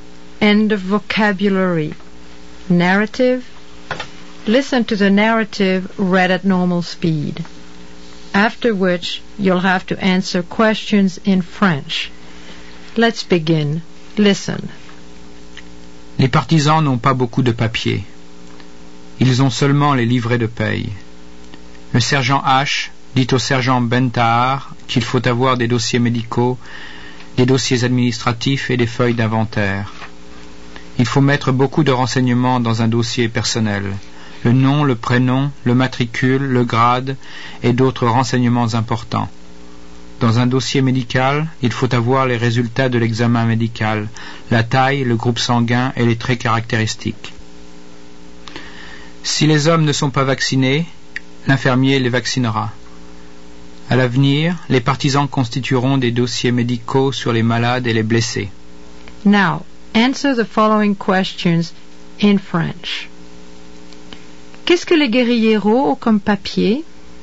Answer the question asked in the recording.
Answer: Ils ont seulement des livrets de paye.